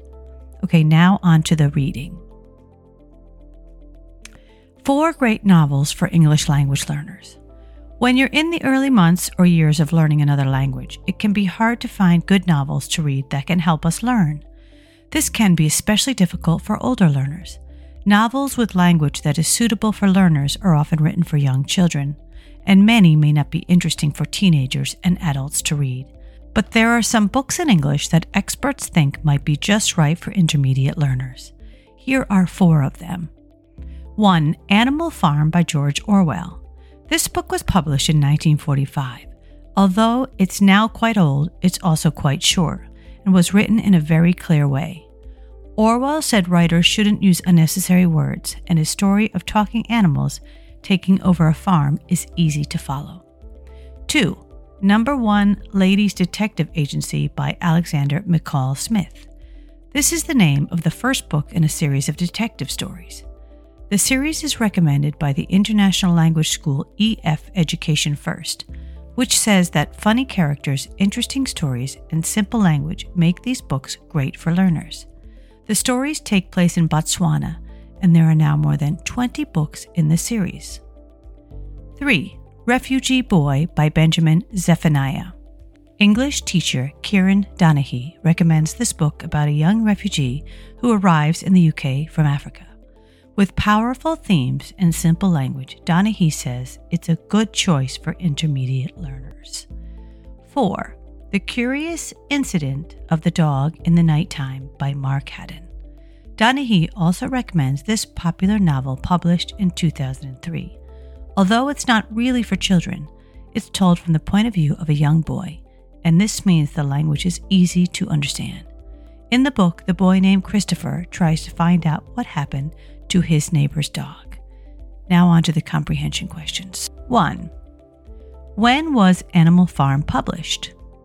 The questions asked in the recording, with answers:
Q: When was Animal Farm published?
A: Answer, 1945.